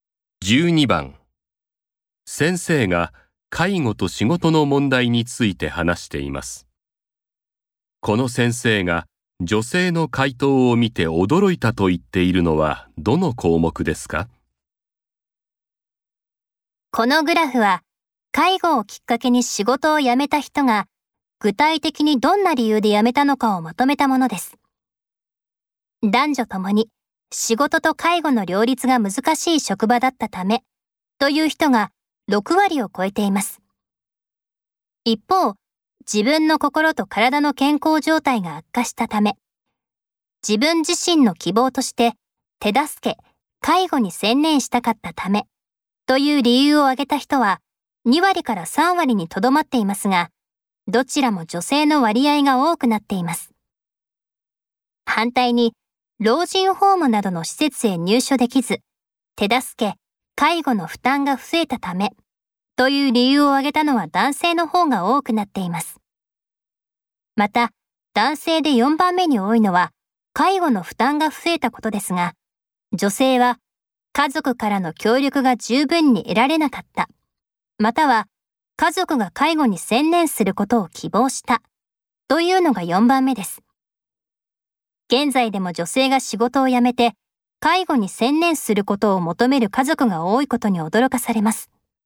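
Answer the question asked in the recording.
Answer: 家族が介護に専念することを希望したため(家族からの協力が十分に得られなかった、または家族が介護に専念することを希望した)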